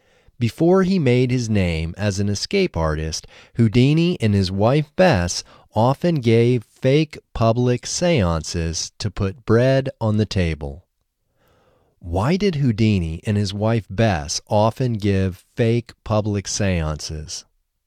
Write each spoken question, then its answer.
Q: Why did Houdini and his wife Bess often give fake public seances?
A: Houdini and his wife Bess often gave fake public seances to put bread on the table.